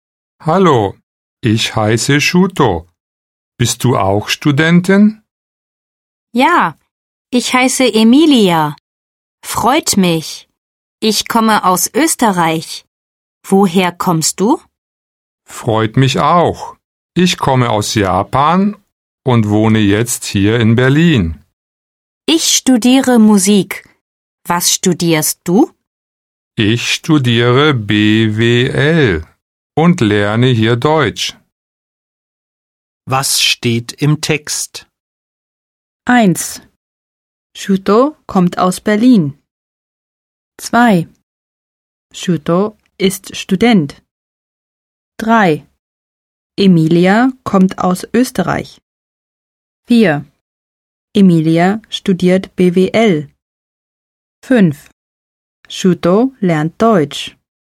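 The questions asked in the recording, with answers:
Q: Shuto kommt aus Berlin.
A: falsch (er kommt aus Japan)

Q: Shuto ist Student.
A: richtig

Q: Emilia kommt aus Österreich.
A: richtig

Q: Emilia studiert BWL.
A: richtig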